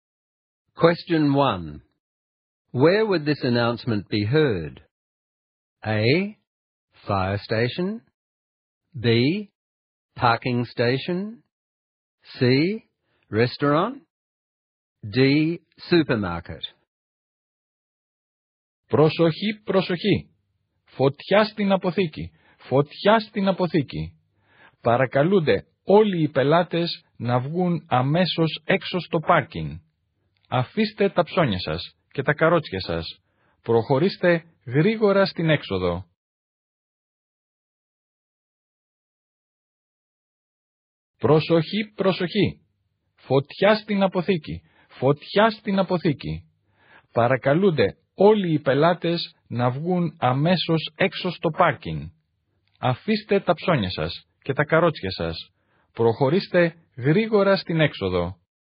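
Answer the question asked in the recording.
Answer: D: Supermarket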